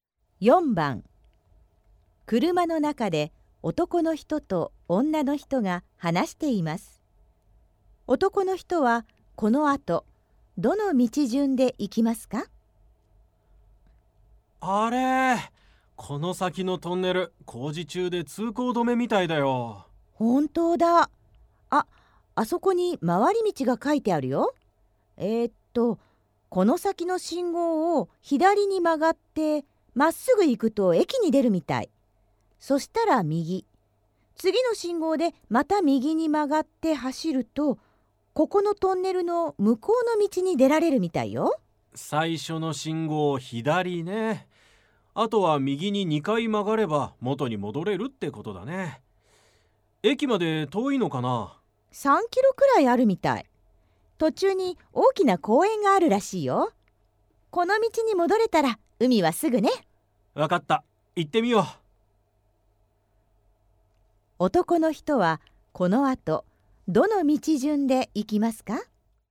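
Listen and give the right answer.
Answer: 最初の信号を左に曲がって駅に出て、右、次の信号でまた右に曲がる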